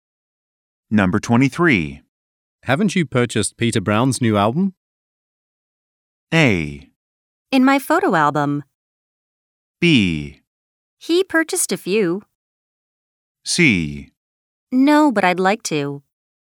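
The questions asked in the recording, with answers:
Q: Haven't you purchased Peter Brown's new album?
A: C: No, but I'd like to.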